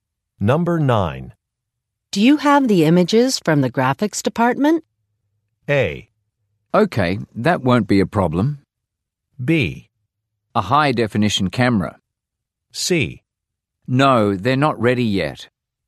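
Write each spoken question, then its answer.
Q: Do you have the images from the graphics department?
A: C: No, they're not ready yet.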